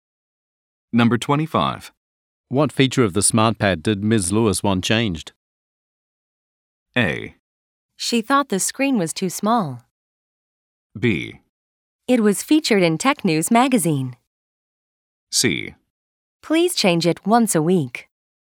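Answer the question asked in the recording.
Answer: A: She thought the screen was too small.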